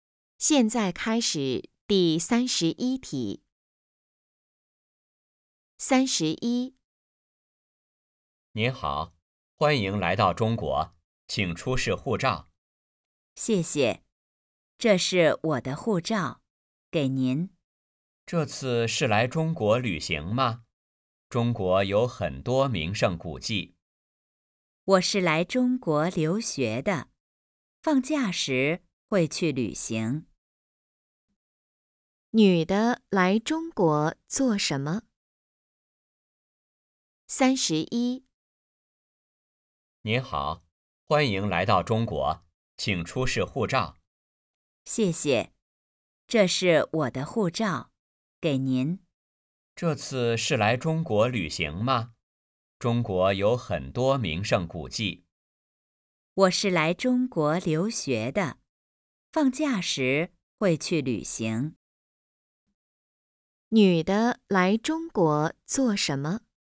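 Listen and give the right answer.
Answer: 留学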